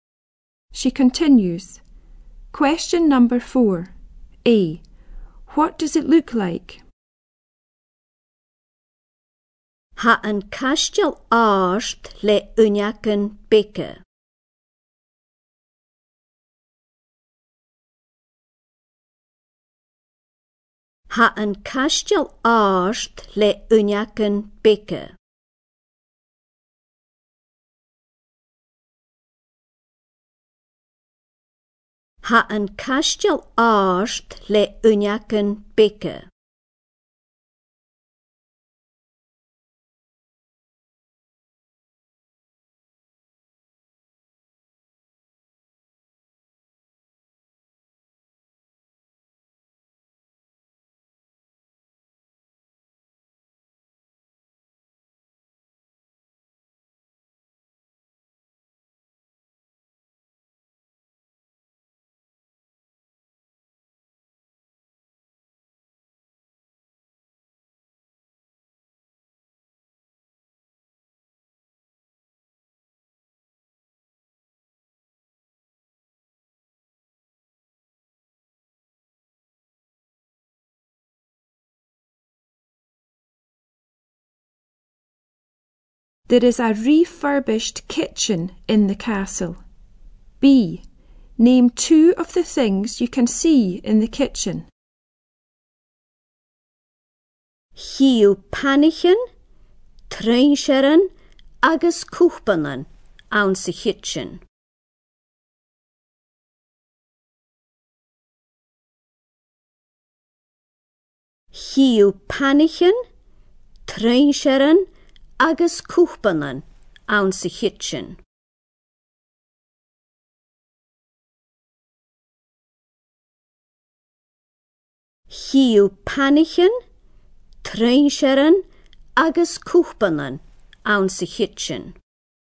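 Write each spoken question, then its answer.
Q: What does it look like?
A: Tall with small windows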